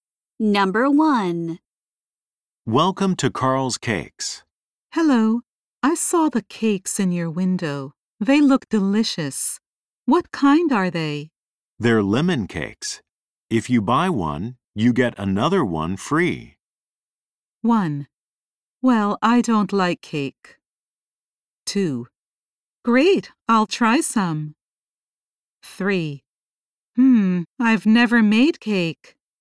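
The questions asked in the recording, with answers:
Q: They're lemon cakes. If you buy one, you get another one free.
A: 2: Great, I'll try some.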